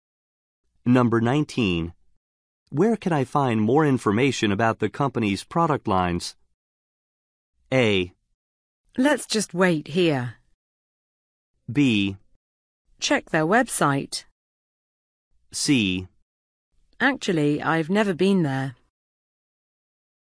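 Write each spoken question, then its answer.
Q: Where can I find more information about the company's product lines?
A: B: Check their website.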